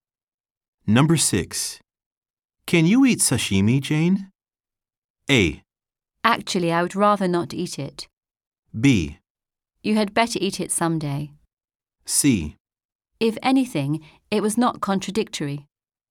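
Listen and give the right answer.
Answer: A: Actually, I would rather not eat it.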